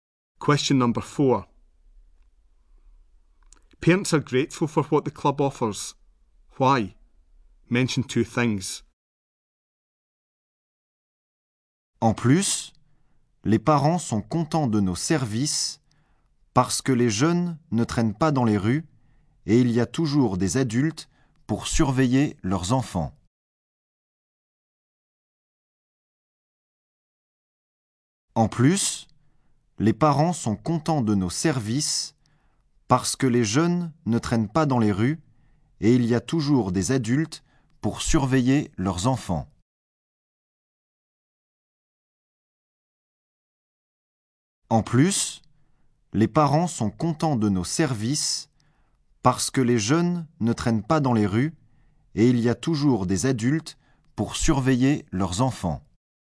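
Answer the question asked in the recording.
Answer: Young people are not hanging about the streets; there are always adults to supervise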